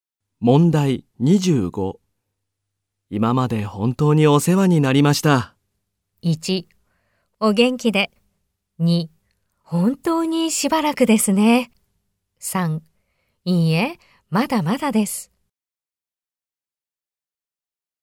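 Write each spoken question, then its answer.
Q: 今まで本当にお世話になりました。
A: 2: お元気で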